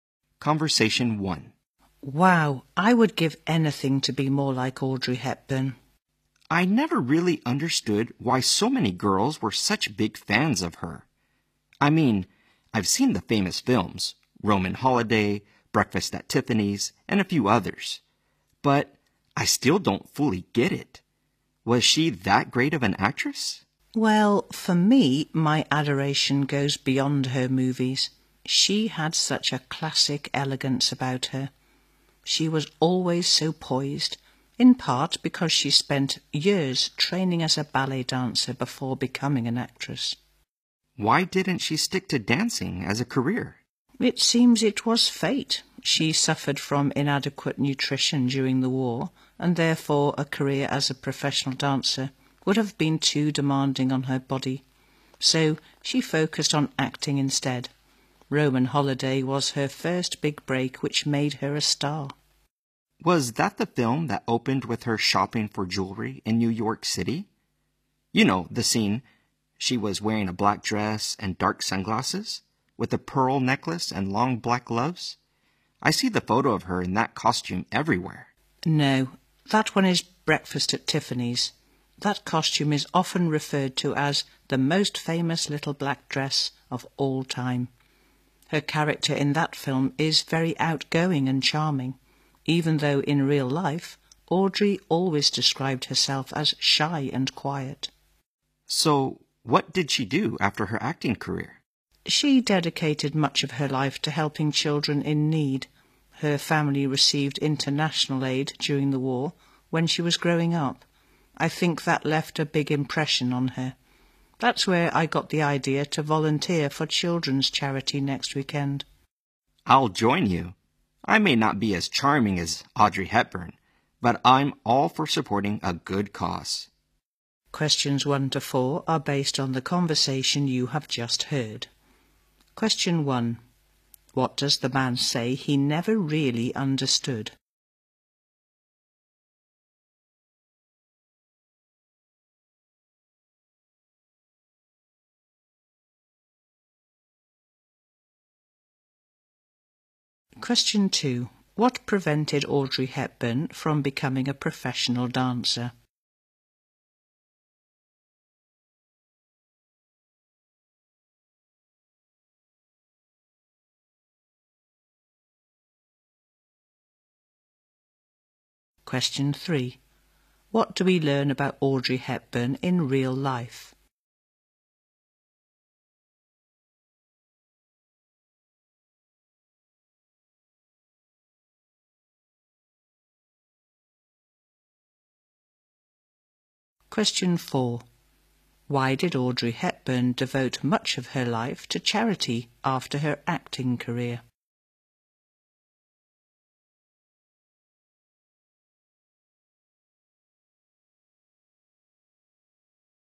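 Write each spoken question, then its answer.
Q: What does the man say he never really understood?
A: Why so many girls were such big fans of Audrey Hepburn

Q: What prevented Audrey Hepburn from becoming a professional dancer?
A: Inadequate nutrition during the war made dancing too demanding on her body

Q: What do we learn about Audrey Hepburn in real life?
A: She described herself as shy and quiet

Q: Why did Audrey Hepburn devote much of her life to charity after her acting career?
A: Her family received international aid during the war when she was growing up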